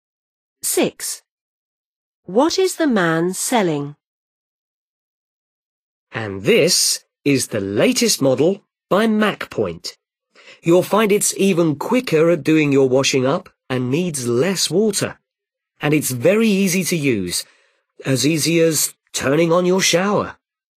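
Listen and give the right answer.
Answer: a dishwasher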